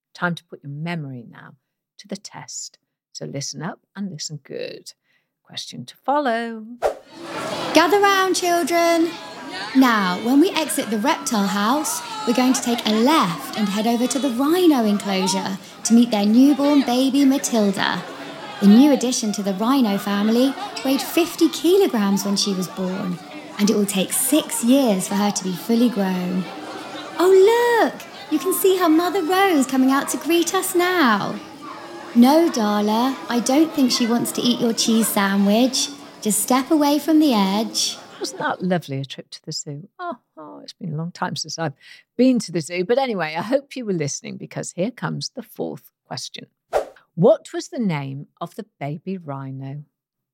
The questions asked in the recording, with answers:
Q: What was the name of the baby rhino?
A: The answer was Matilda.